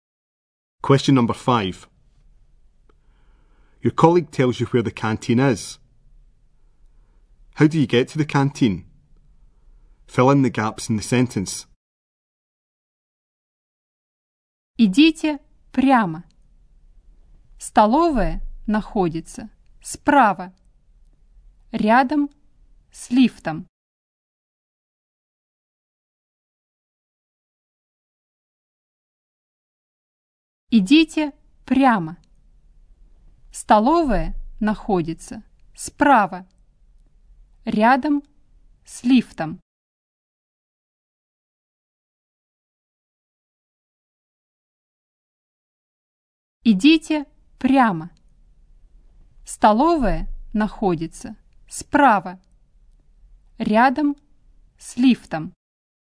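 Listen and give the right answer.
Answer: Go straight on; it is on the right, next to the lift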